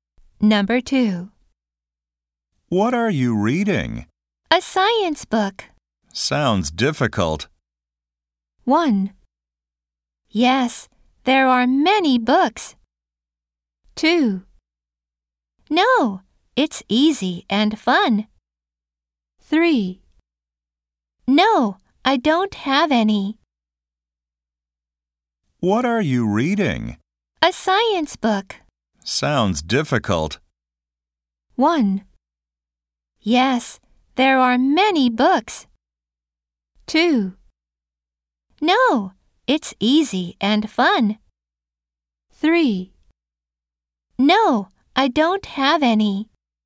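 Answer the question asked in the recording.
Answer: 2: No, it's easy and fun.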